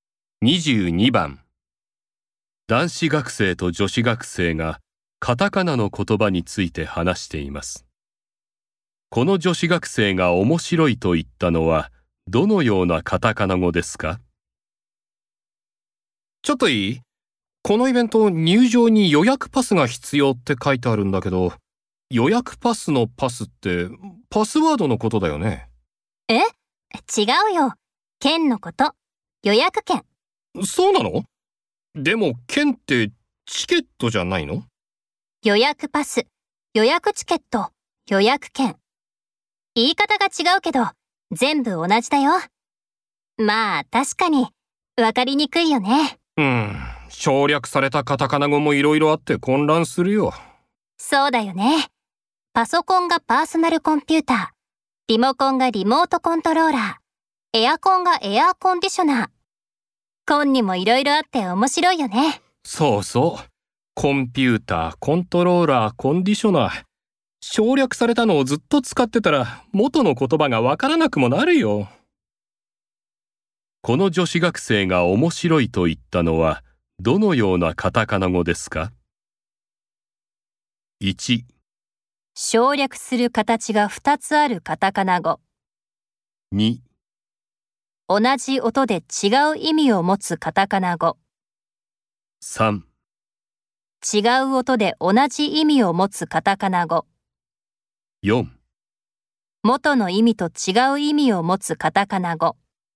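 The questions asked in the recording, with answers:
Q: この女子学生が面白いと言ったのは、どのようなカタカナ語ですか?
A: 2: 同じ音で違う意味を持つカタカナ語。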